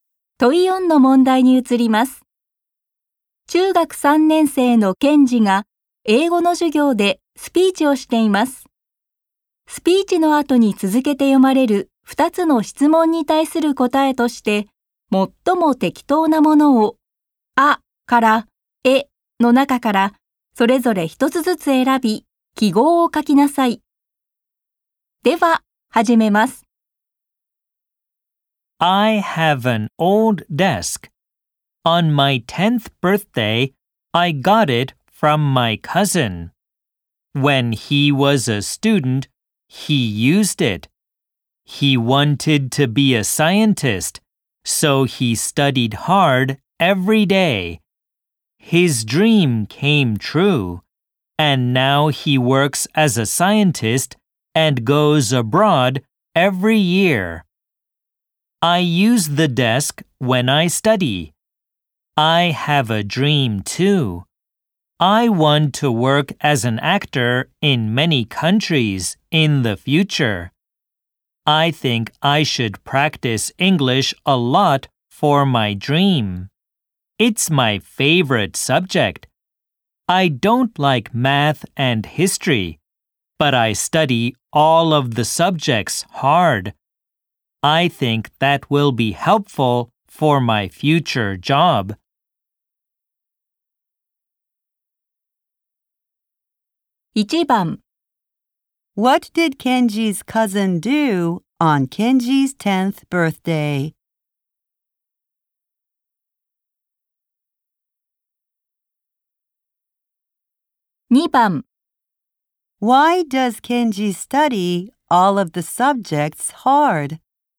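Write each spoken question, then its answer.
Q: What did Kenji's cousin do on Kenji's 10th birthday?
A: He gave Kenji his old desk.

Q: Why does Kenji study all of the subjects hard?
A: Because he thinks it will be helpful for his future job.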